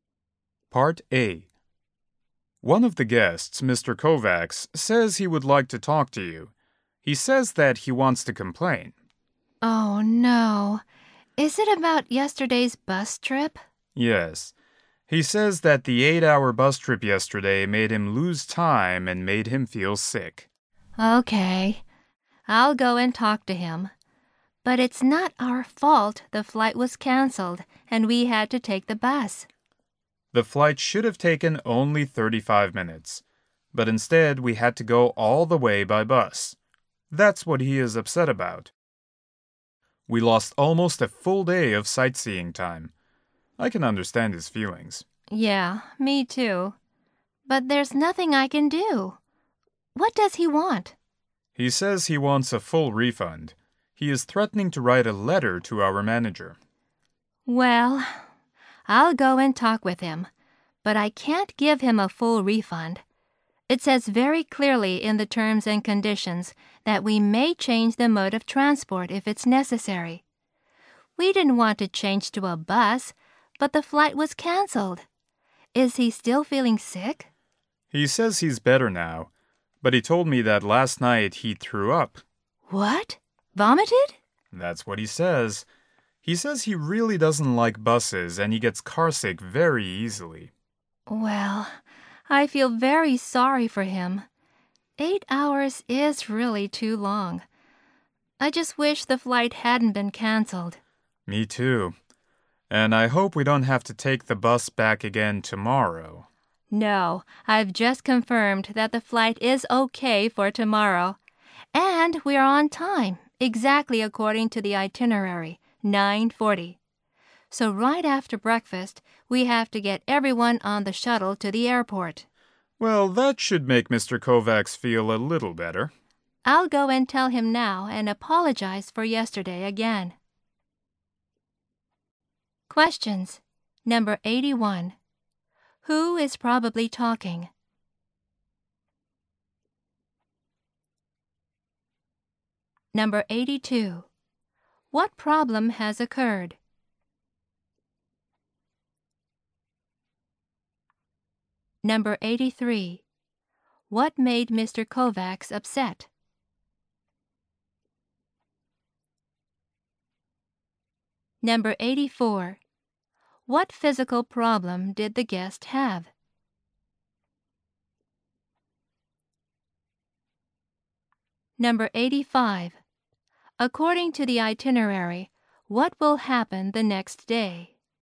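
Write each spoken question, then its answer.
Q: What problem has occurred?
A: The flight was canceled, so they had to take an 8-hour bus

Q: What made Mr. Kovacs upset?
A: The 8-hour bus trip lost sightseeing time and made him sick

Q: What physical problem did the guest have?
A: He got carsick and vomited

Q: According to the itinerary, what will happen the next day?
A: They will take the 9:40 flight as scheduled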